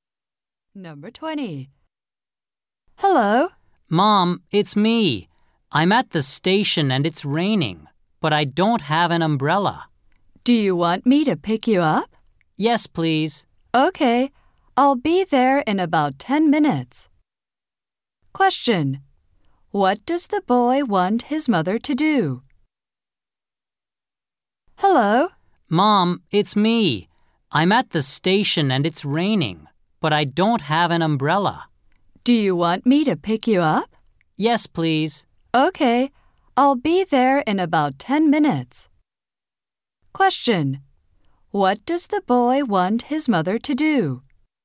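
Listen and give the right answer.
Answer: Pick him up at the station.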